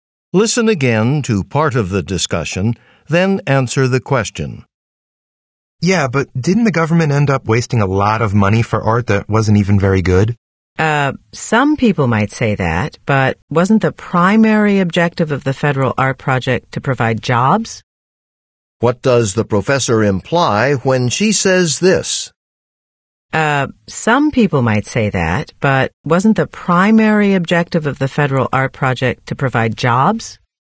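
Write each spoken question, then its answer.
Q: What does the professor imply when she says this?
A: The art's quality mattered less, since the project's main goal was to create jobs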